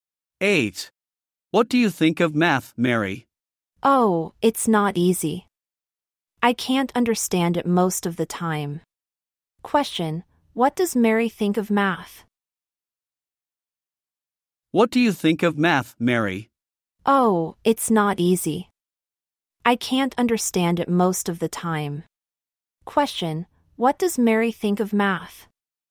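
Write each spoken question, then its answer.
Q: What does Mary think of math?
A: It's not easy; she can't understand it most of the time.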